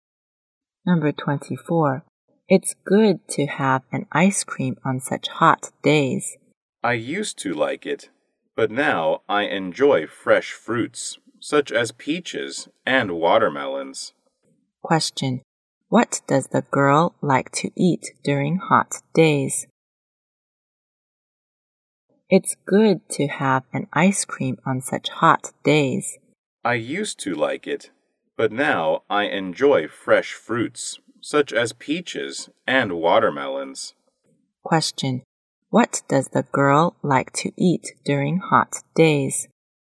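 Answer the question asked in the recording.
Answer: Fresh fruits, such as peaches and watermelons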